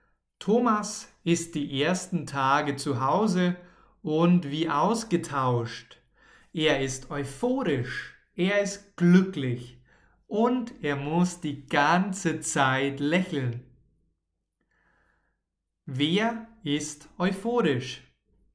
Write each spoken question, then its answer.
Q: Wer ist euphorisch?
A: Thomas. Thomas ist euphorisch.